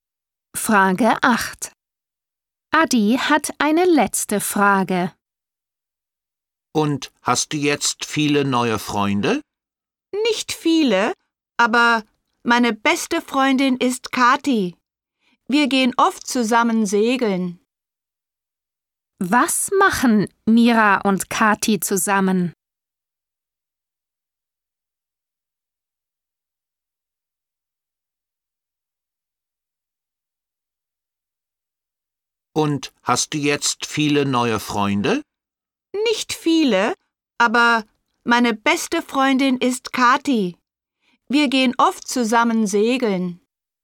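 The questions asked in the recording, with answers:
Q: Was machen Mira und Kathi zusammen?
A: Sie gehen segeln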